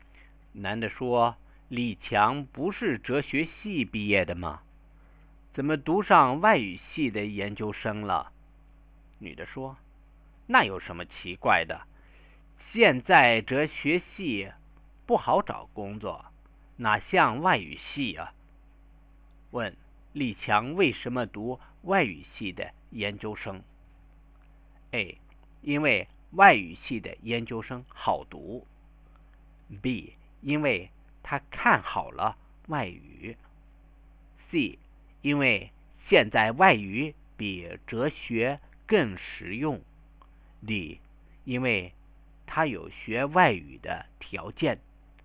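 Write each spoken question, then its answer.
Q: 李强为什么读外语系的研究生?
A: C: 因为现在外语比哲学更实用。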